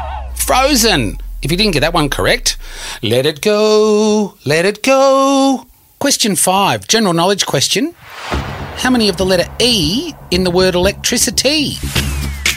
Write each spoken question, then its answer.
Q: How many of the letter E in the word electricity?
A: The answer is 2.